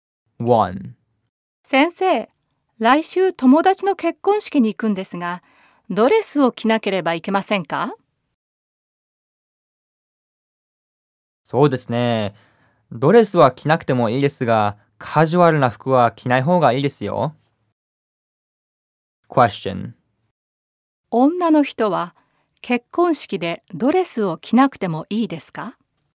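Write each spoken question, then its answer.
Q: 女の人は結婚式でドレスを着なくてもいいですか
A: はい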